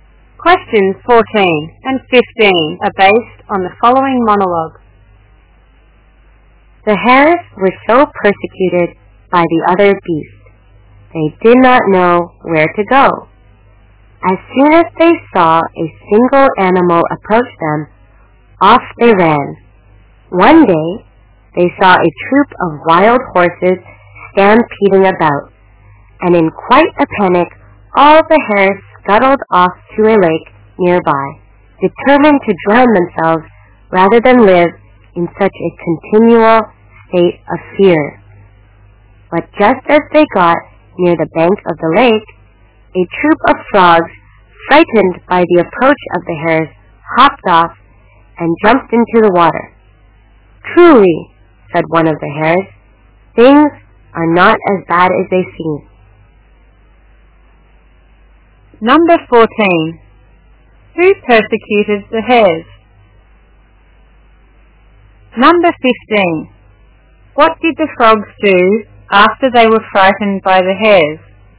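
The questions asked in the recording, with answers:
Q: Who persecuted the hares?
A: The other beasts

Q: What did the frogs do after they were frightened by the hares?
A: They hopped off and jumped into the water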